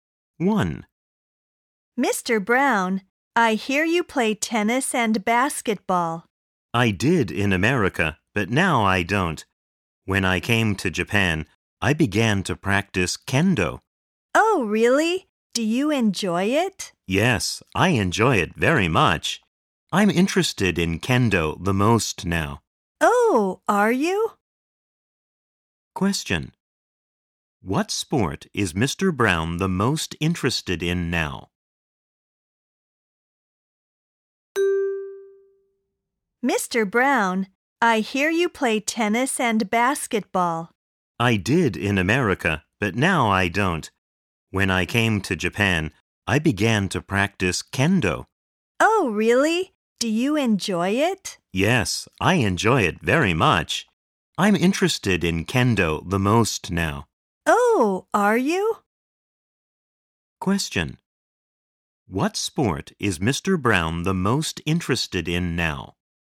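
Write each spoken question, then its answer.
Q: What sport is Mr. Brown the most interested in now?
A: Kendo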